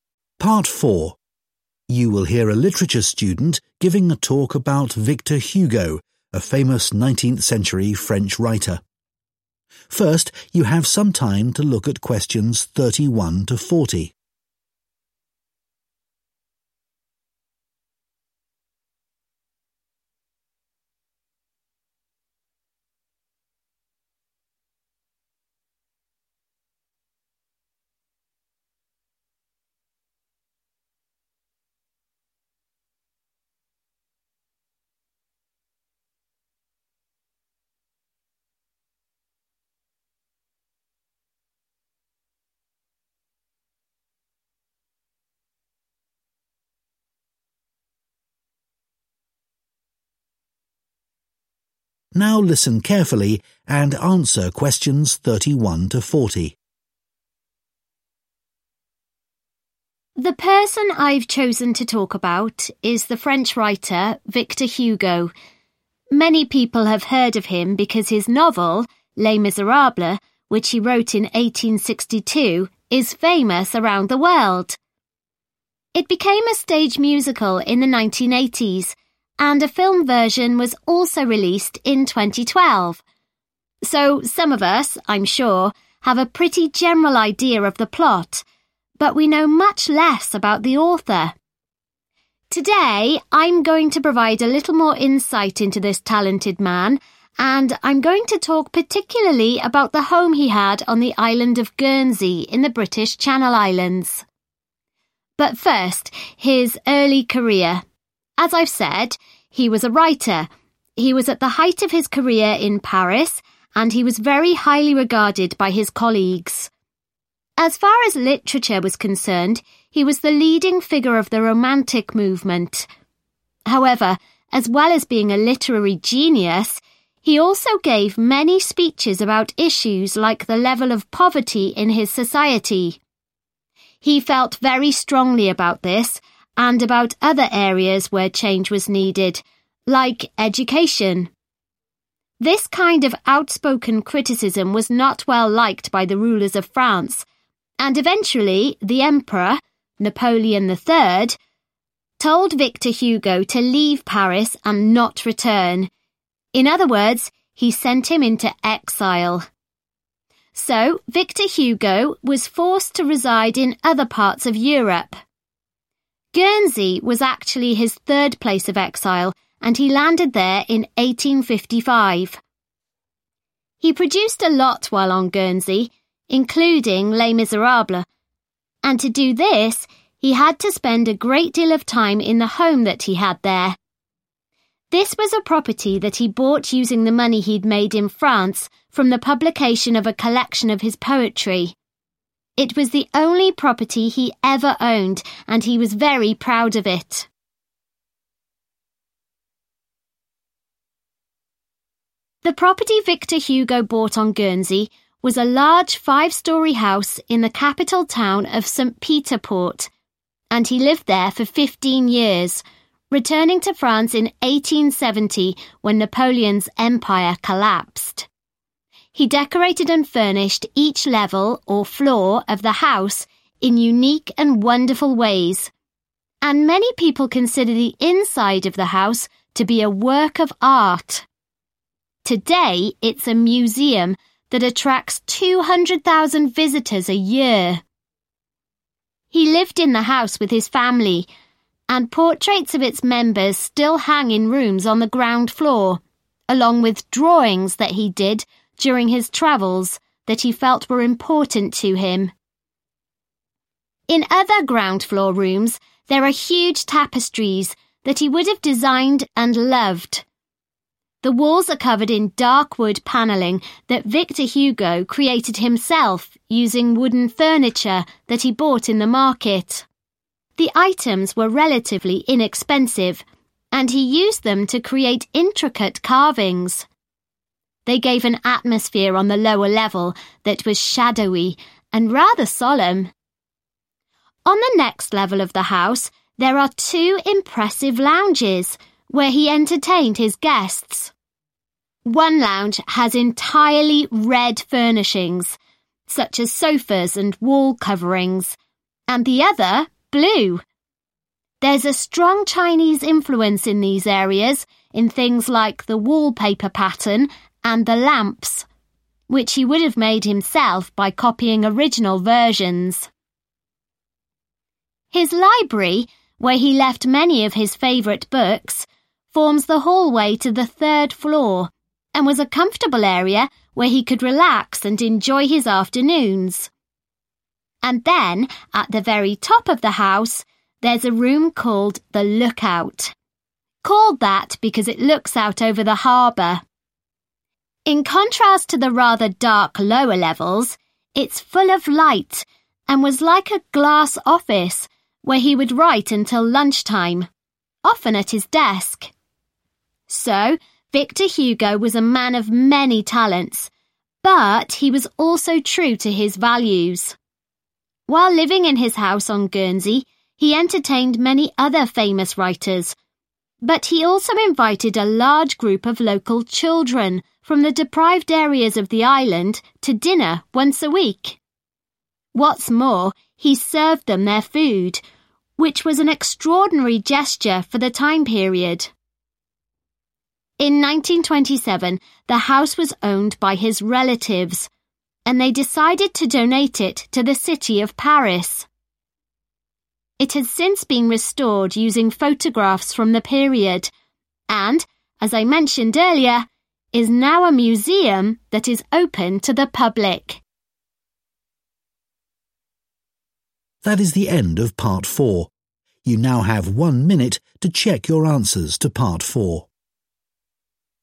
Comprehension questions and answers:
Complete the notes below. Write ONE WORD ONLY for each answer.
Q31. We know more about its overall (31) than about its author.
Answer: Plot

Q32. He spoke publicly about social issues, such as (32) and education.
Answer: Poverty

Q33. Victor Hugo had to live elsewhere in (33)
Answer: Europe

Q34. He used his income from the sale of some (34) he had written to buy a house on Guernsey.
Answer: Poetry

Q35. The ground floor contains portraits, (35) and tapestries that he valued.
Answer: Drawings

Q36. He bought cheap (36) made of wood and turned this into beautiful wall carvings.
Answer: Furniture

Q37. The first floor consists of furnished areas with wallpaper and (37) that have a Chinese design.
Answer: Lamps

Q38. He wrote in a room at the top of the house that had a view of the (38)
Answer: Harbour/ harbor

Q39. He entertained other writers as well as poor (39) in his house.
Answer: Children

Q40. Victor Hugo's (40) gave ownership of the house to the city of Paris in 1927.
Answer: Relatives